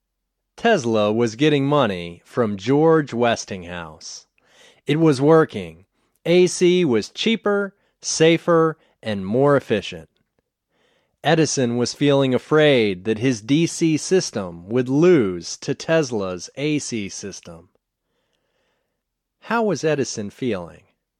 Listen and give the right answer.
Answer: Edison was feeling afraid that his DC system would lose to Tesla's AC system.